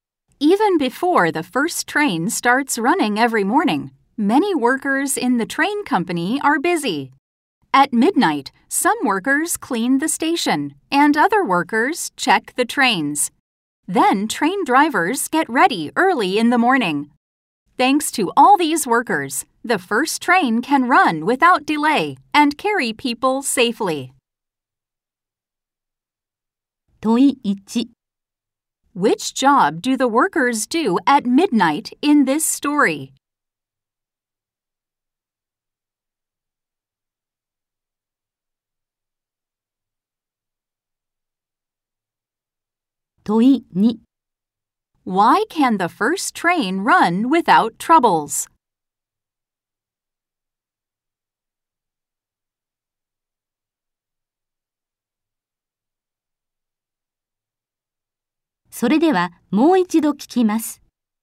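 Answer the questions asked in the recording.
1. They clean the station and check the trains.
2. Because many workers clean the station, check the trains and get ready before it runs.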